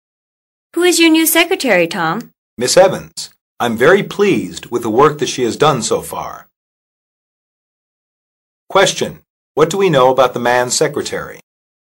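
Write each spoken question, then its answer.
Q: What do we know about the man's secretary?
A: She does good work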